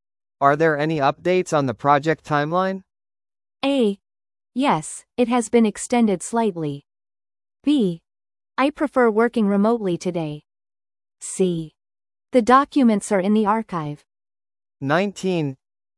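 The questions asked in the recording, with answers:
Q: Are there any updates on the project timeline?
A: A: Yes, it has been extended slightly.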